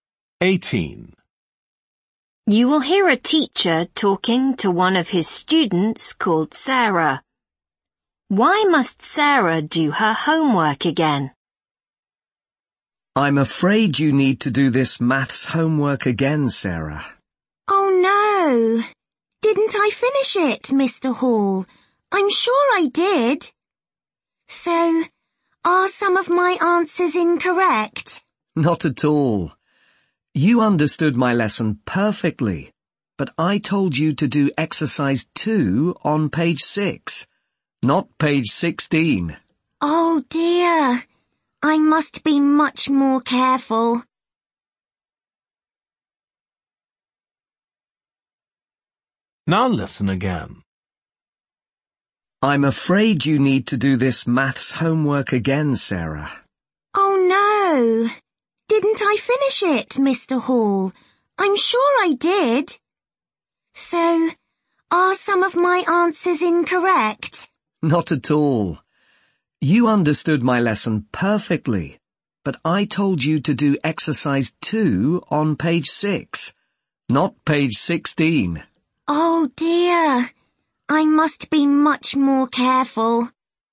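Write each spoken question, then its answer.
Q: Why must Sarah do her homework again?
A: She did the exercise on the wrong page (16 instead of 6)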